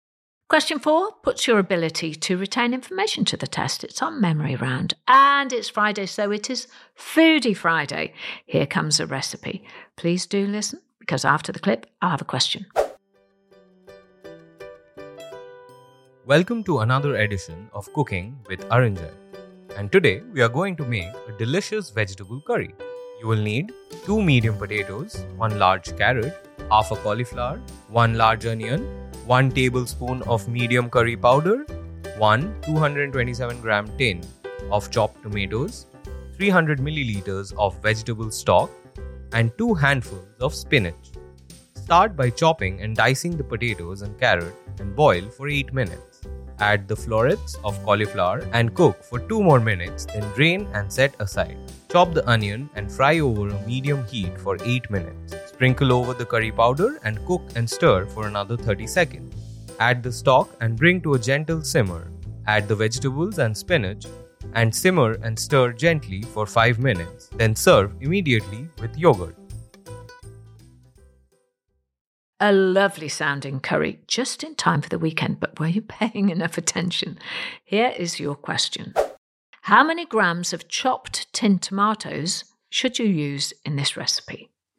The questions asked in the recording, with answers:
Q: How many grams of chopped tin tomatoes should you use in this recipe?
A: And the answer in the clip was 227 grams.